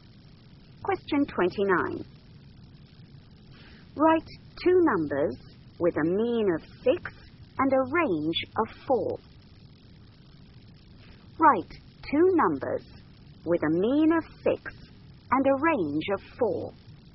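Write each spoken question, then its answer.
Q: Write two numbers with a mean of 6 and a range of 4.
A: 4 and 8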